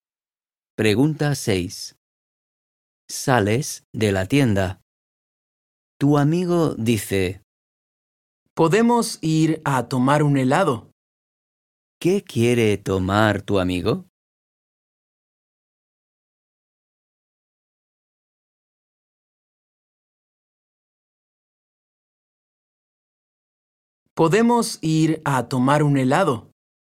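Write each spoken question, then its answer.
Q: ¿Qué quiere tomar tu amigo?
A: un helado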